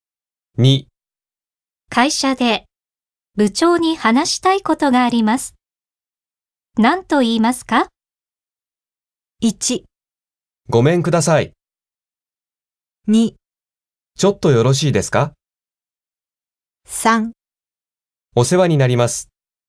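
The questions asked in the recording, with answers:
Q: 会社で部長に話したいことがあります。何と言いますか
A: 2: ちょっとよろしいですか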